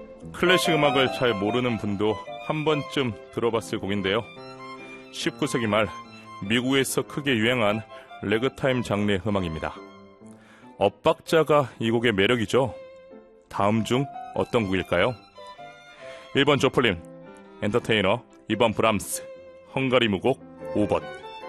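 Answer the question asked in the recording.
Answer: 1번: 조플린, 엔터테이너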